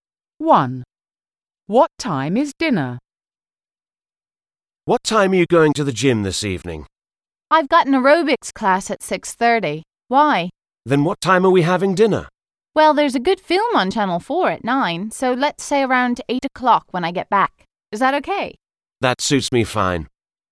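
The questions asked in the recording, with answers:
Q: What time is dinner?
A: around 8 o'clock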